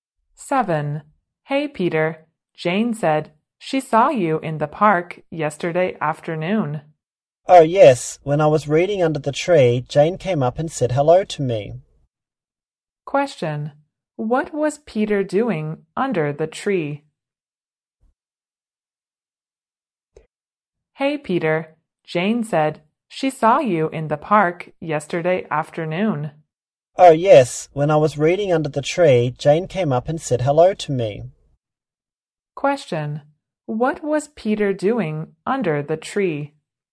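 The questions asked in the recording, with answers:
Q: What was Peter doing under the tree?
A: Reading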